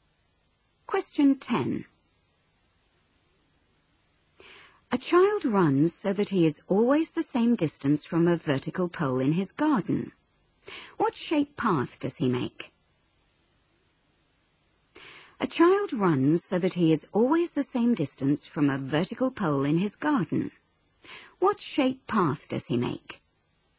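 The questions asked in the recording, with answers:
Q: What shape path does he make?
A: A circle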